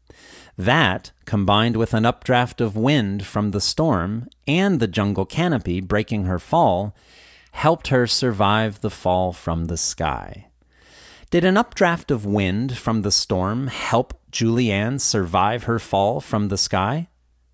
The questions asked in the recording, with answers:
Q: Did an updraft of wind from the storm help Julianne survive her fall from the sky?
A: Yes, an updraft of wind from the storm probably helped Julianne survive her fall from the sky.